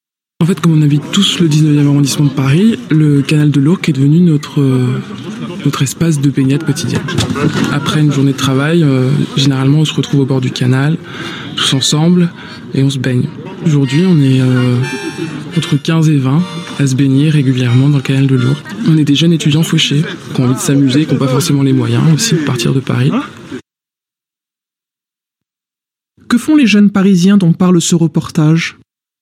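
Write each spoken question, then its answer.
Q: Que font les jeunes parisiens dont parle ce reportage ?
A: Ils se baignent régulièrement dans le canal de l'Ourcq.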